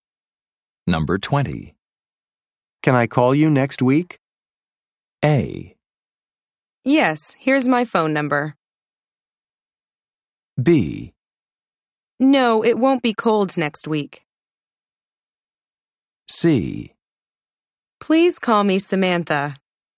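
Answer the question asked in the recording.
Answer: A: Yes, here's my phone number.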